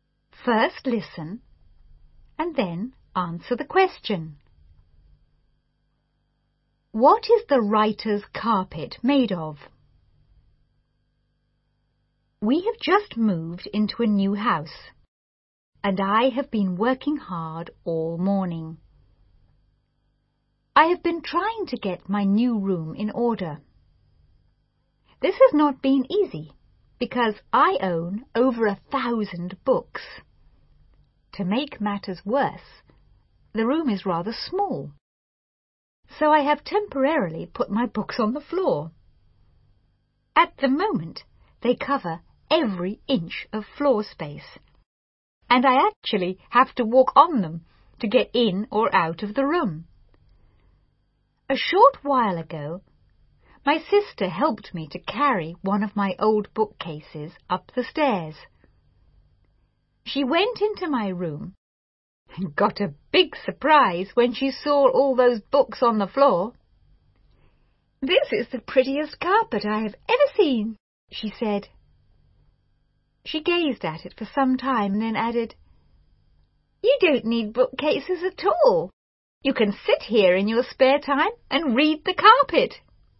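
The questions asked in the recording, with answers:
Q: What is the writer's carpet made of?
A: Books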